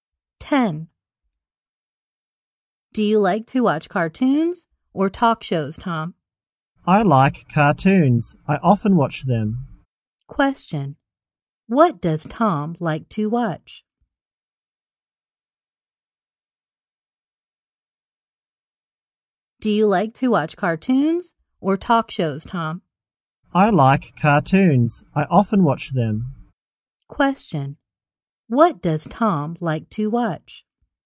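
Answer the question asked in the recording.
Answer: Cartoons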